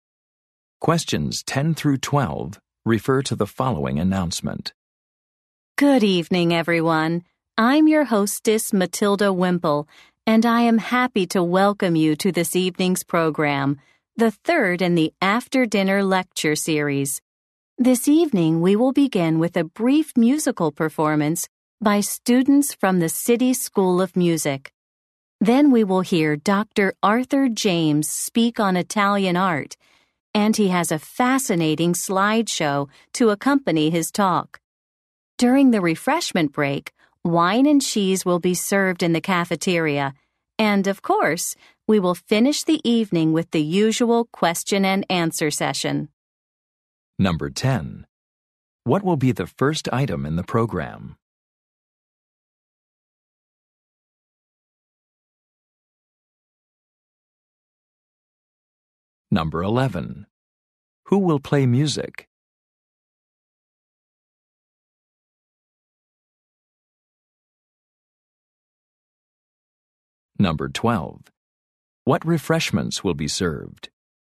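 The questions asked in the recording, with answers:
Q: What will be the first item in the program?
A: A brief musical performance

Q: Who will play music?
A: Students from the City School of Music

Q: What refreshments will be served?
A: Wine and cheese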